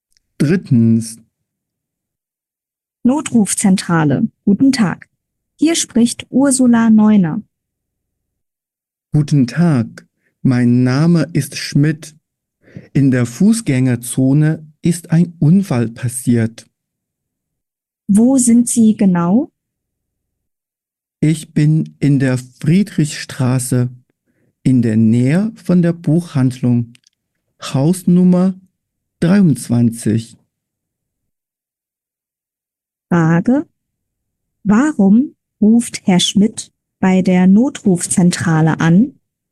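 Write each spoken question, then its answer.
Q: Warum ruft Herr Schmidt bei der Notrufzentrale an?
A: In der Fußgängerzone ist ein Unfall passiert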